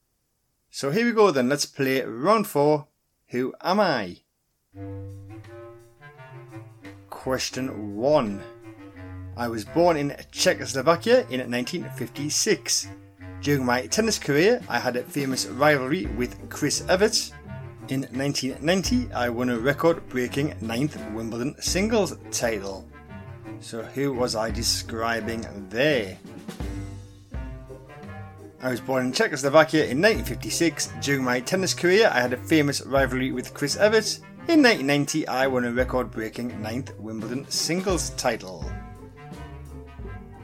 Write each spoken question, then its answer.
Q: So who was I describing there?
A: Those clues all relate to Martina Navratilova.